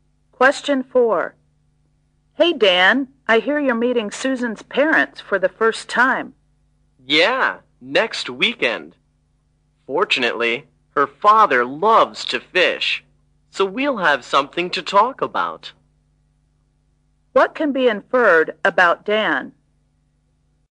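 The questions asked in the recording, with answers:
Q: What can be inferred about Dan?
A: He likes fishing too.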